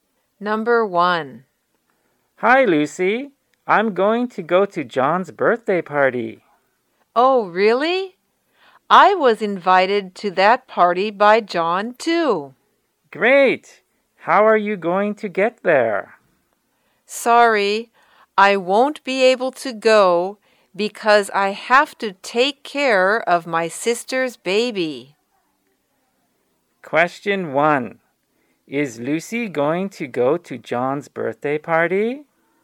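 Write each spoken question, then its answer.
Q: Is Lucy going to go to John's birthday party?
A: No, she has to take care of her sister's baby.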